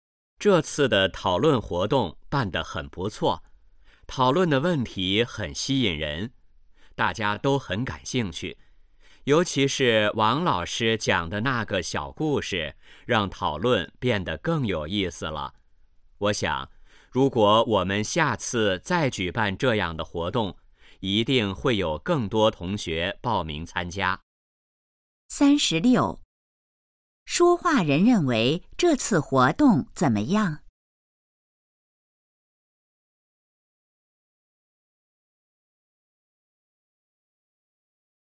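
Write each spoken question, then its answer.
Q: 说话人认为这次活动怎么样?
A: 很不错

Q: 王老师在活动中做了什么?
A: 讲了一个小故事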